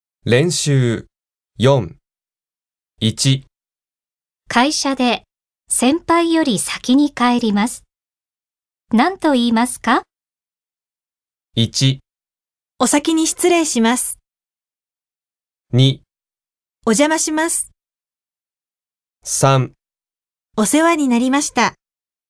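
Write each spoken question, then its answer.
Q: 会社で先輩より先に帰ります。何と言いますか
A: 1: お先に失礼します。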